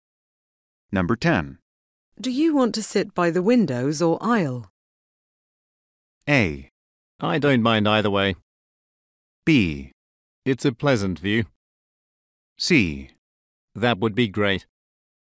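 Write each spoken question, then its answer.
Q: Do you want to sit by the windows or aisle?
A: A: I don't mind either way.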